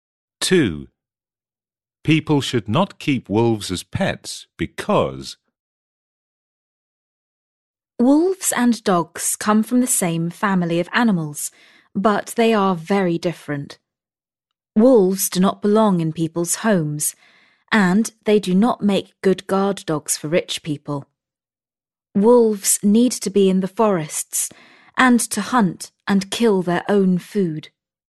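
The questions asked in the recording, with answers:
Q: People should not keep wolves as pets because...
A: wolves need to be in forests, hunting and killing their own food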